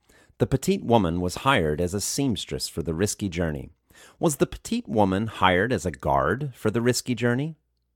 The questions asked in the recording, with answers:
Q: Was the petite woman hired as a guard for the risky journey?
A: No, the petite woman wasn't hired as a guard for the risky journey.